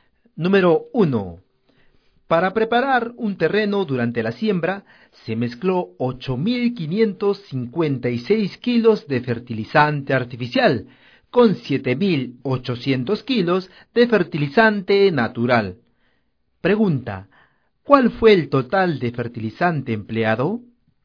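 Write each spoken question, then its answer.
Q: Pregunta, ¿cuál fue el total de fertilizante empleado?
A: 16.356 kilos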